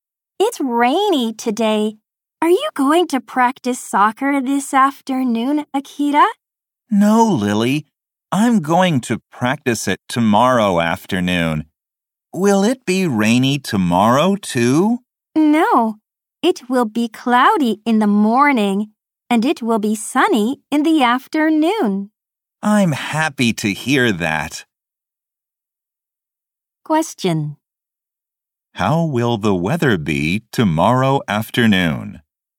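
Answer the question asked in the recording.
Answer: It will be sunny.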